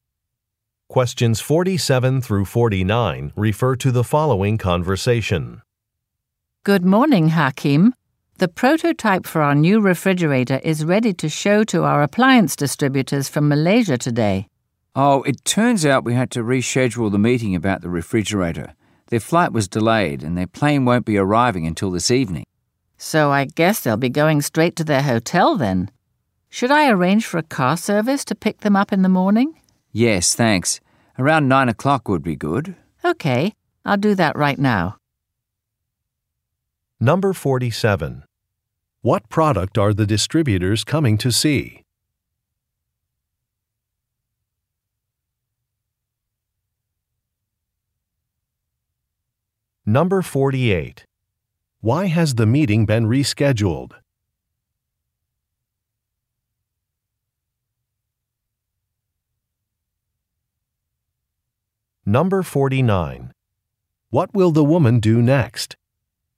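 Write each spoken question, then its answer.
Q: What product are the distributors coming to see?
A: A refrigerator

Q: Why has the meeting been rescheduled?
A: The distributors' flight was delayed

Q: What will the woman do next?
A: Arrange a car service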